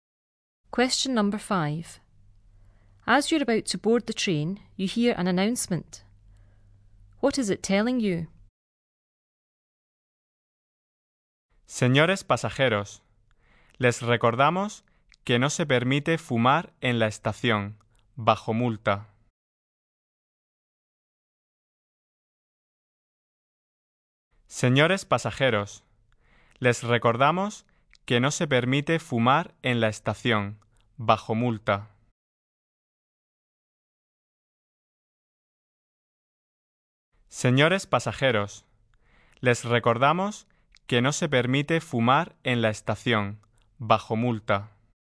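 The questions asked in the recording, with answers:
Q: What is it telling you?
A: Smoking is not allowed in the station; you will be fined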